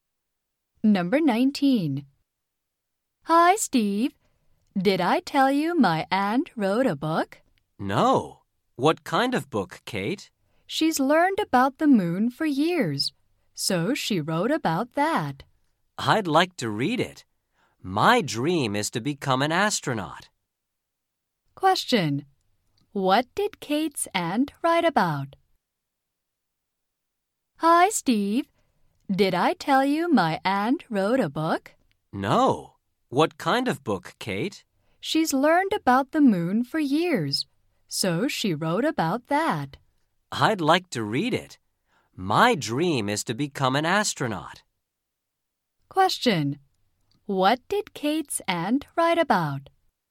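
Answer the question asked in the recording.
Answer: The moon.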